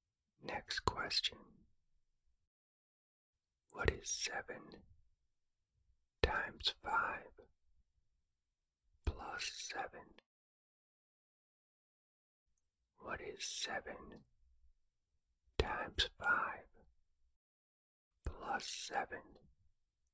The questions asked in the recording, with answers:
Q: What is 7 times 5 plus 7?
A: The answer is 42.